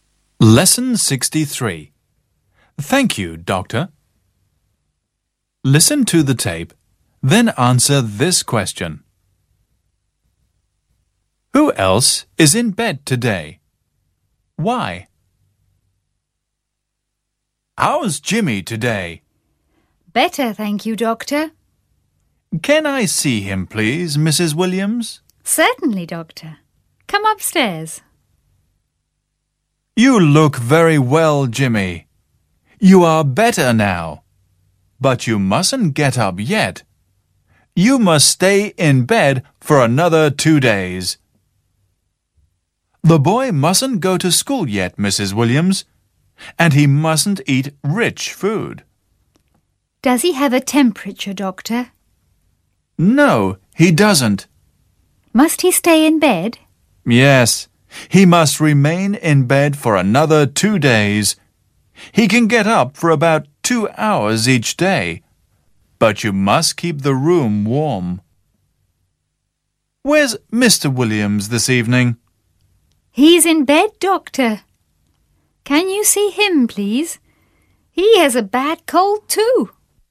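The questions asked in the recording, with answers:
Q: Who else is in bed today? Why?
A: Mr. Williams, because he has a bad cold.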